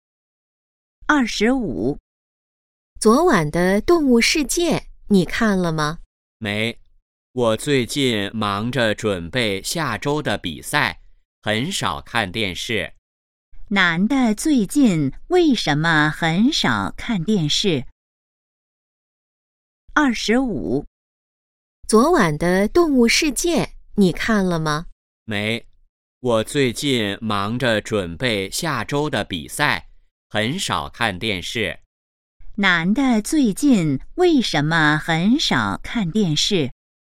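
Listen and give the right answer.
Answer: 忙着准备下周的比赛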